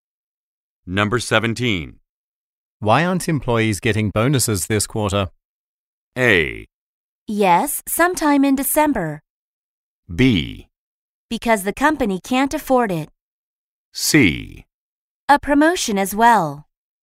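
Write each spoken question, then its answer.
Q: Why aren't employees getting bonuses this quarter?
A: B: Because the company can't afford it.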